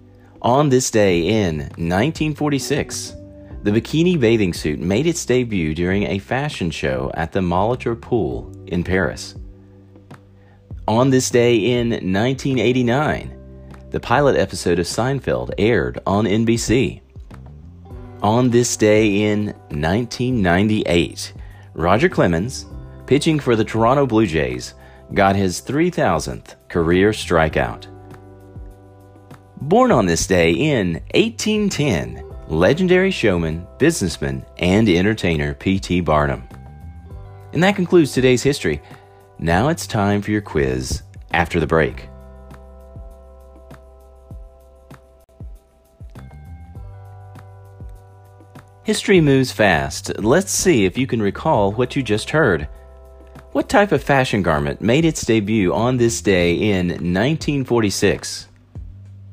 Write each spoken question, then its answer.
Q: What type of fashion garment made its debut on this day in 1946?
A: Answer, the bikini.